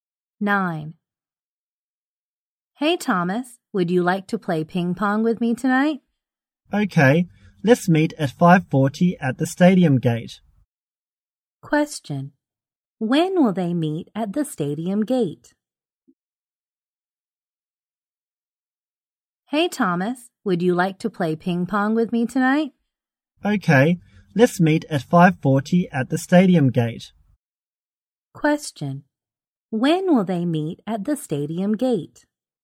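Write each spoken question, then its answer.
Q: When will they meet at the stadium gate?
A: At 5:40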